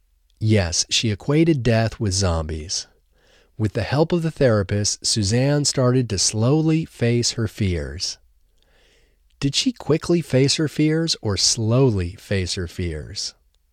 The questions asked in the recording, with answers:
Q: Did she quickly face her fears or slowly face her fears?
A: She slowly faced her fears.